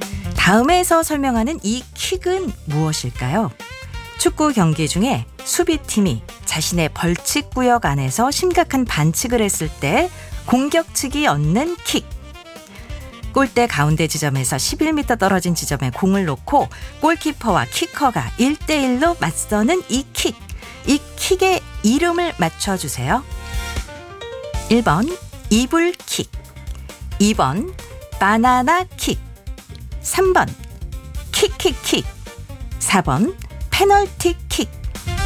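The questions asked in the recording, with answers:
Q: 이 킥의 이름을 맞춰주세요.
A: 4번: 페널티킥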